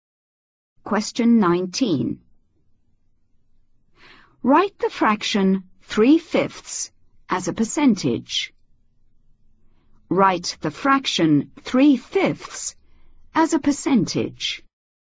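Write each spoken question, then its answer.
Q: Write the fraction 3/5 as a percentage.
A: 60%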